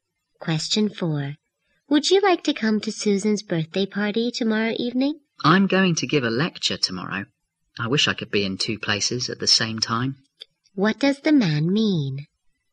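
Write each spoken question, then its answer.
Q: What does the man mean?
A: He can't go to Susan's party because he is giving a lecture.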